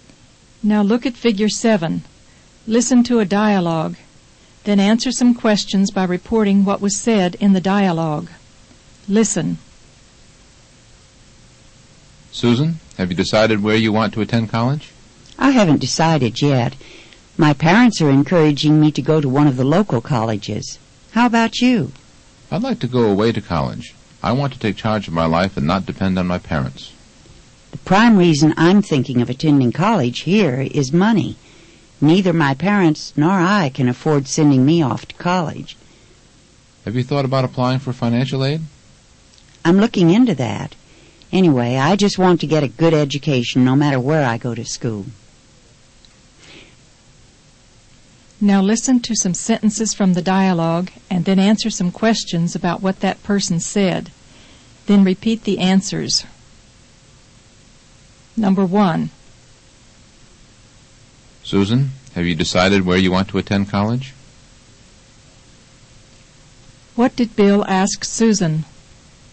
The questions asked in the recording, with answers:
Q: What did Bill ask Susan?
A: Bill asked Susan if she had decided where she wanted to go to college.